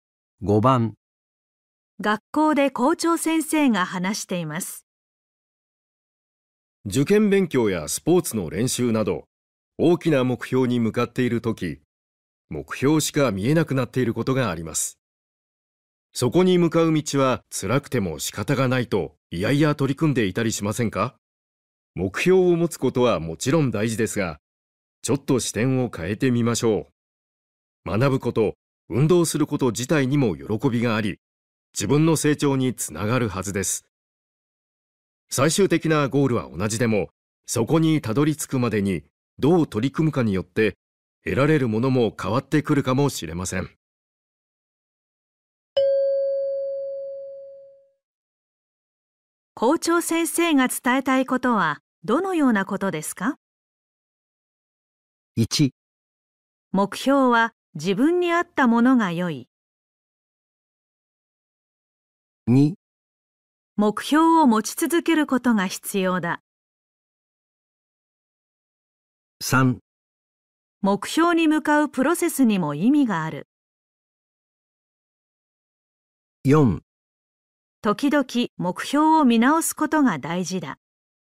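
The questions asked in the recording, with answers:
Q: 校長先生が伝えたいことはどのようなことですか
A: 3: 目標に向かうプロセスにも意味がある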